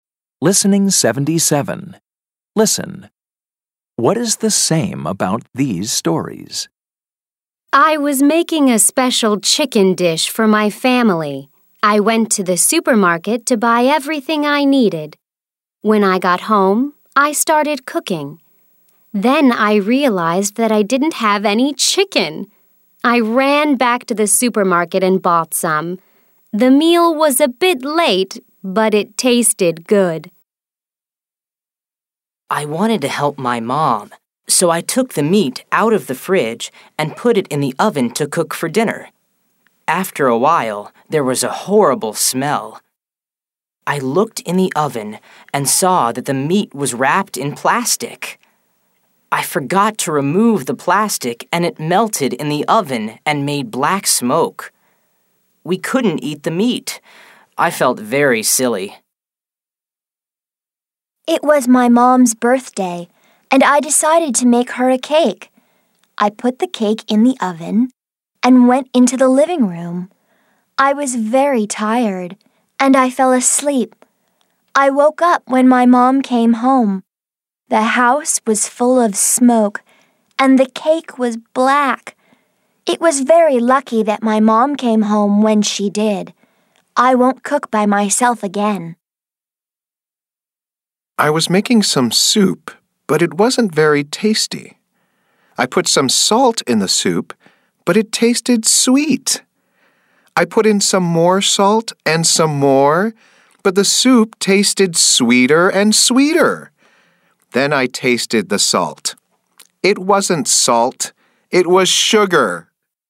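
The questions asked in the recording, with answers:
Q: What is the same about these stories?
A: They are all about cooking mistakes/problems.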